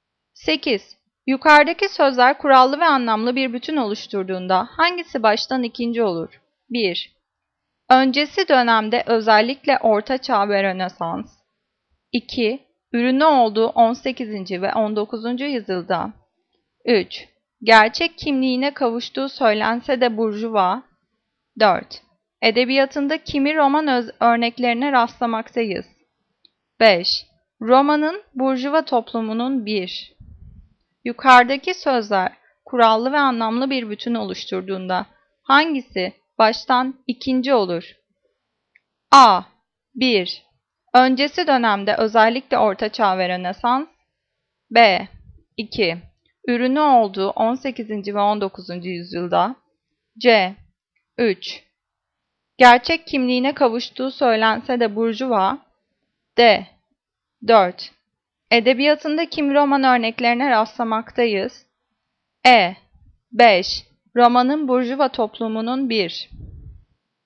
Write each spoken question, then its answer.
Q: Yukarıdaki sözler kurallı ve anlamlı bir bütün oluşturduğunda hangisi baştan ikinci olur?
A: Cevap B. 2. Ürünü olduğu 18. ve 19. yüzyılda.